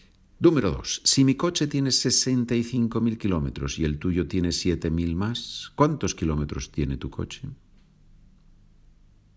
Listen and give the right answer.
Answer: tu coche tiene, lógicamente, 72.000 kilómetros.